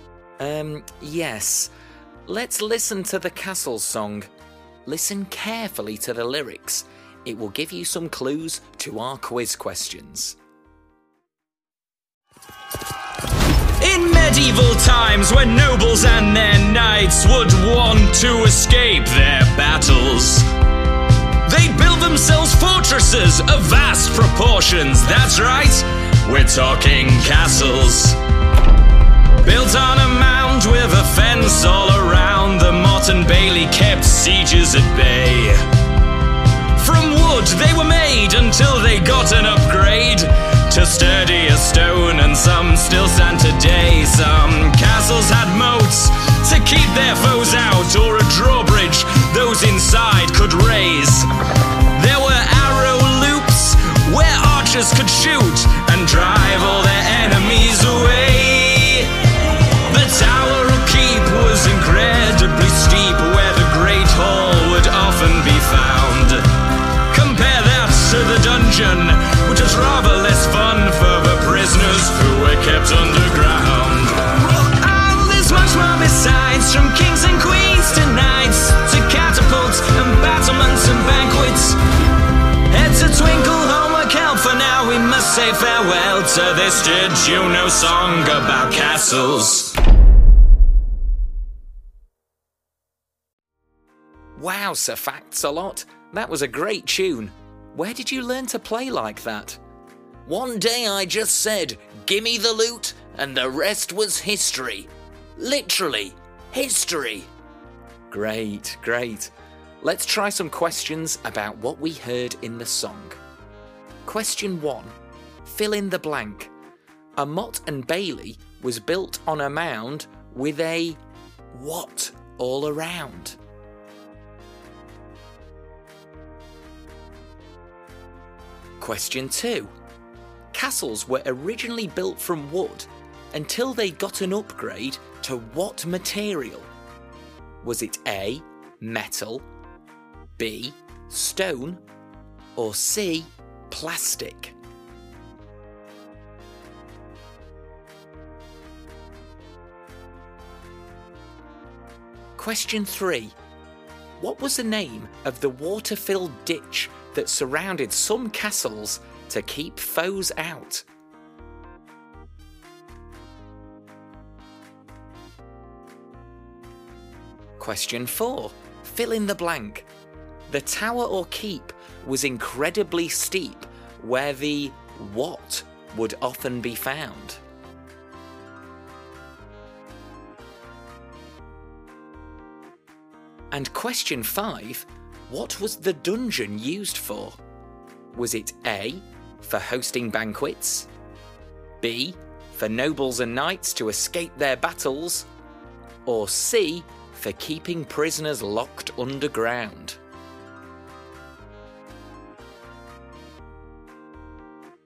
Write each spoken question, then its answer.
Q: A Mott and Bailey was built on a mound with a what all around?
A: The answer is a fence.

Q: Castles were originally built from wood until they got an upgrade to what material?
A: So the answer is B, stone.

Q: What was the name of the water-filled ditch that surrounded some castles to keep foes out?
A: A moat was used to keep enemies from the castle.

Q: What was the dungeon used for?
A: The answer is C.